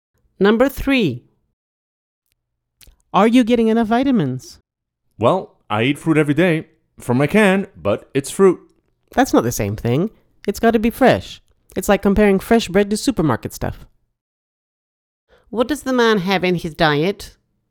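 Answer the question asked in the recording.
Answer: Canned fruit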